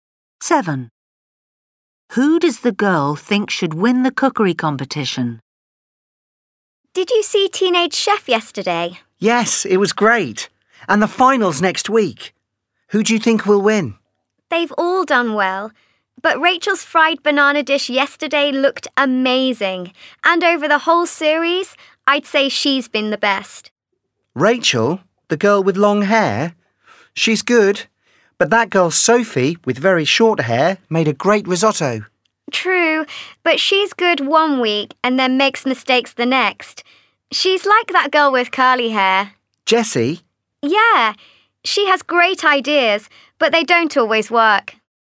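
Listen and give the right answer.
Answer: Rachel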